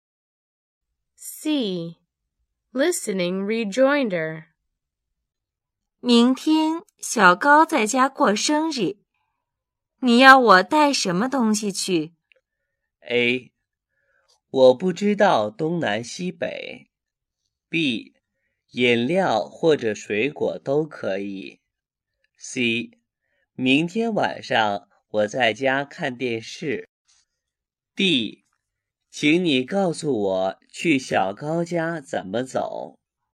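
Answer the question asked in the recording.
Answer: B: 饮料或者水果都可以。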